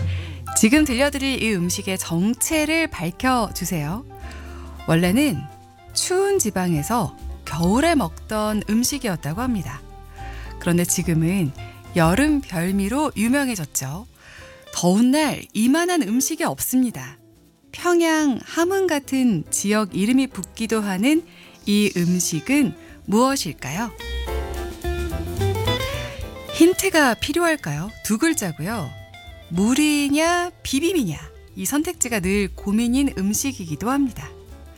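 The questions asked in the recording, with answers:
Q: 평양 함흥 같은 지역 이름이 붙기도 하는 이 음식은 무엇일까요?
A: 냉면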